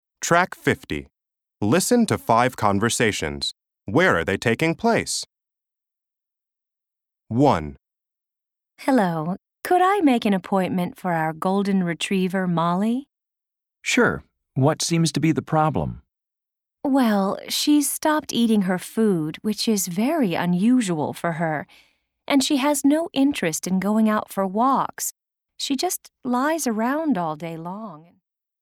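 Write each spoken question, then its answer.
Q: Where are they taking place?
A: At a vet's office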